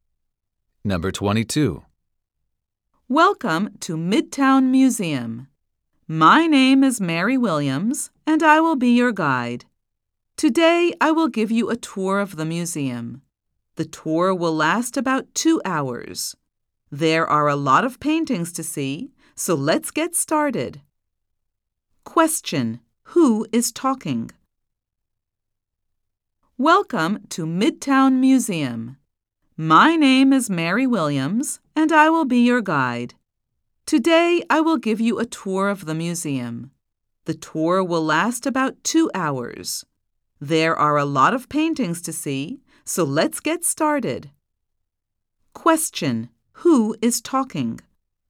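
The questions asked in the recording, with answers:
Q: who is talking?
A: A museum guide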